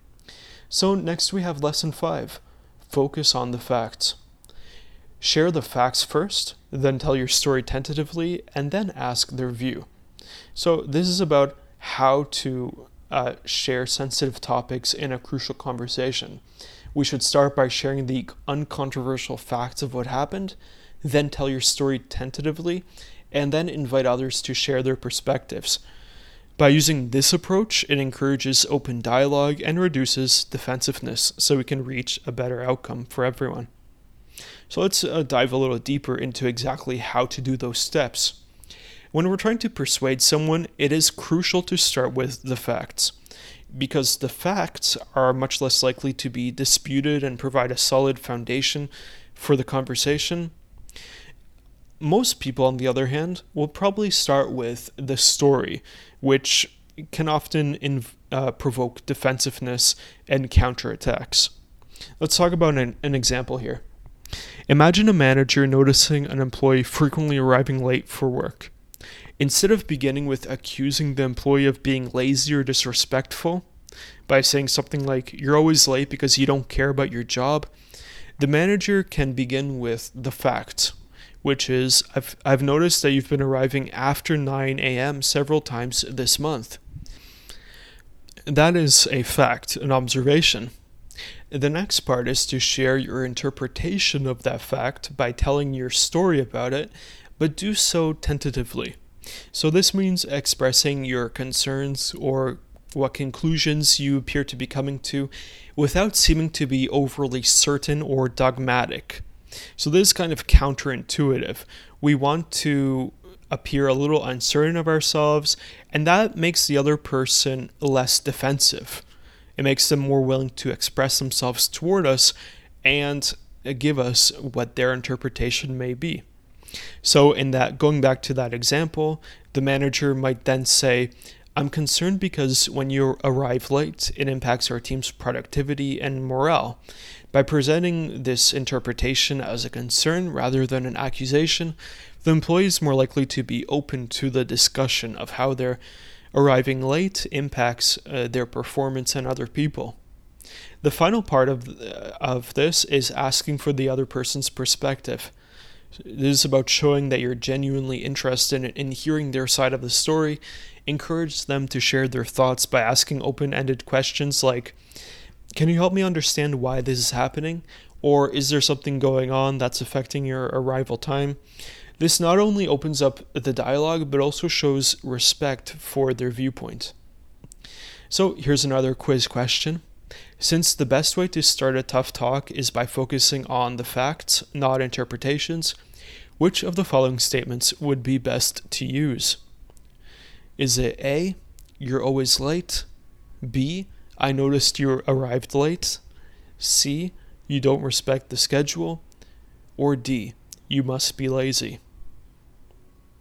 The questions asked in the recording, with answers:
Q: Since the best way to start a tough talk is by focusing on the facts, not interpretations, which of the following statements would be best to use?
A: Correct answer here is B, "I noticed you arrived late," because it focuses on the facts.